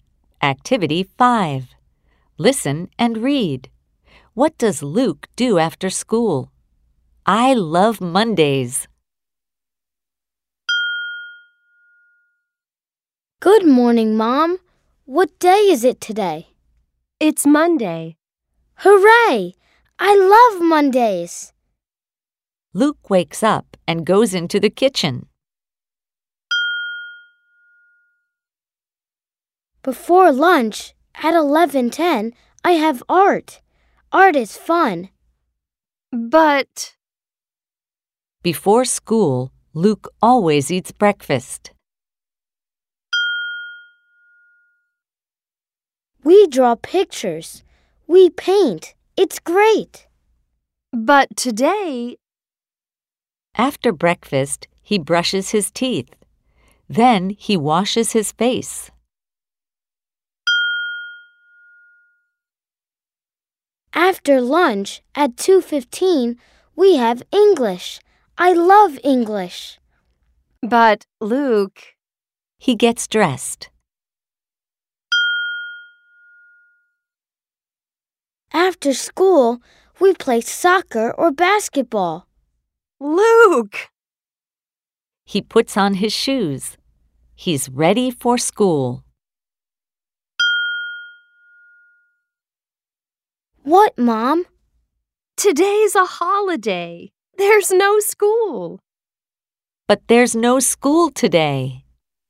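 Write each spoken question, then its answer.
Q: What does Luke do after school?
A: He plays soccer or basketball.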